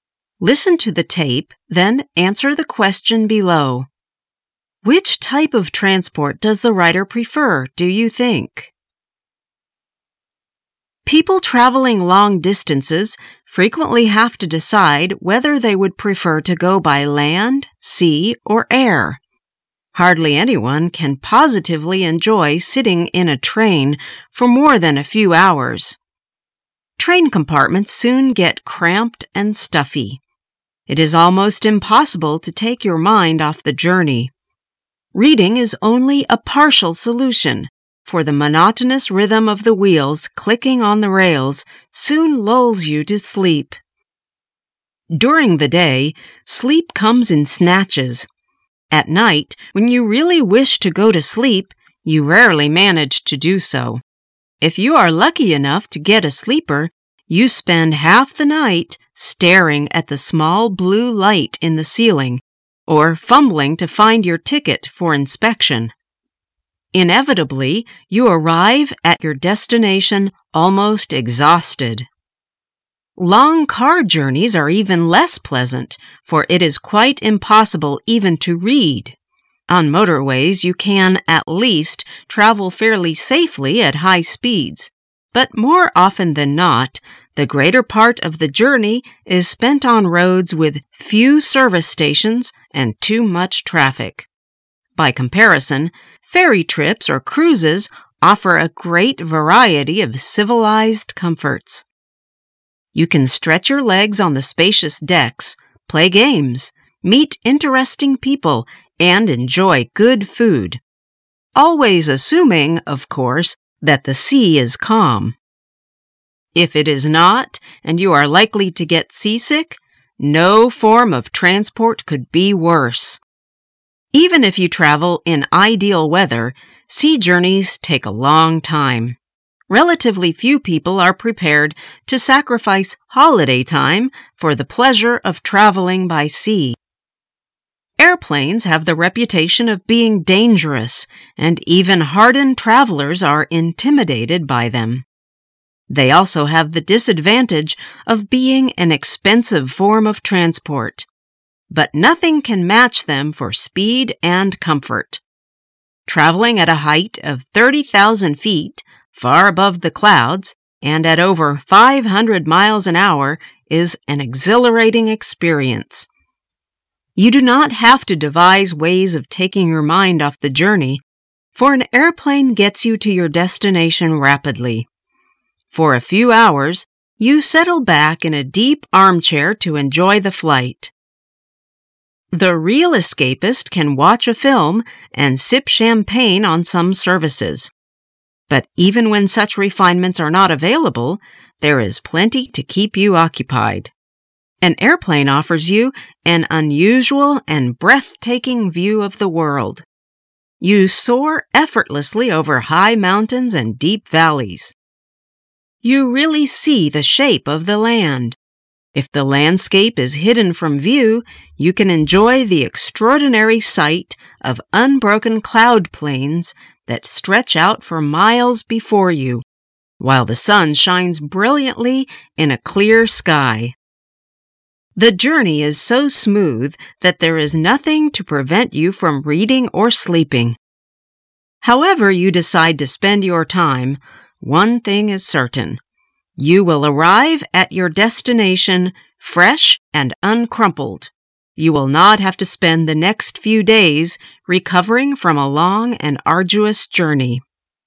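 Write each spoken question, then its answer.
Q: Which type of transport does the rider prefer, do you think?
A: Air travel (airplanes)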